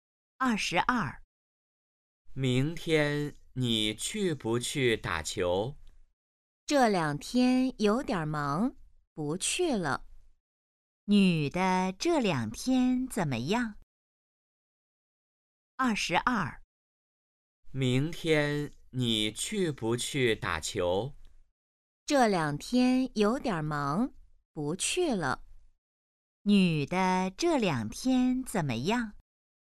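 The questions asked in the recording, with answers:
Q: 女的这两天怎么样?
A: 有点忙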